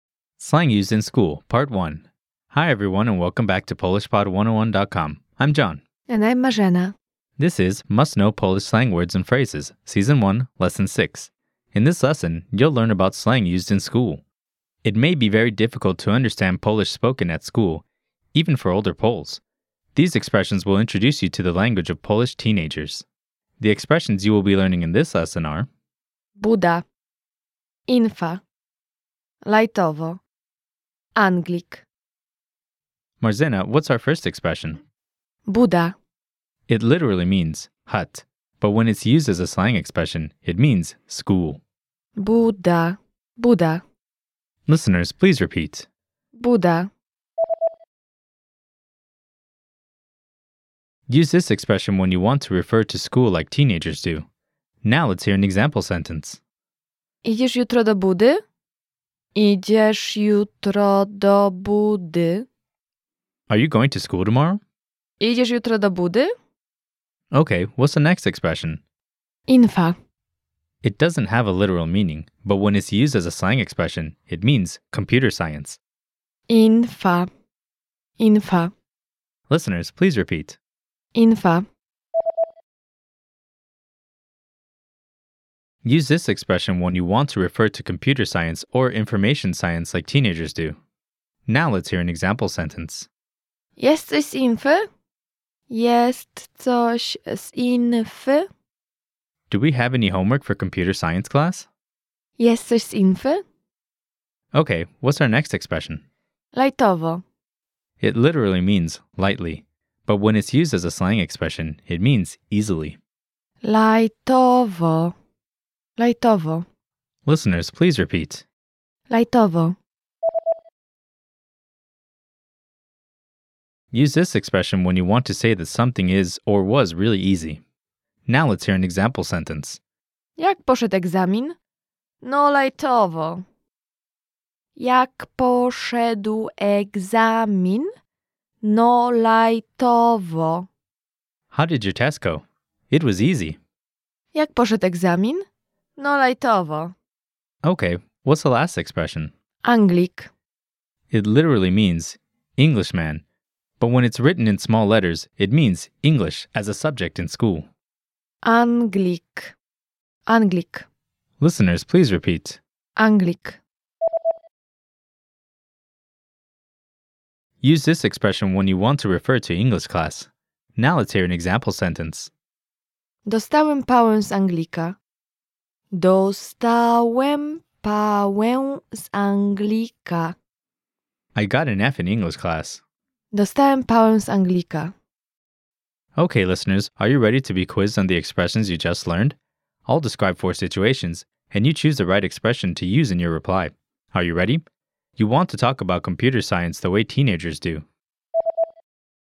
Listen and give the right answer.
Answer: Infa.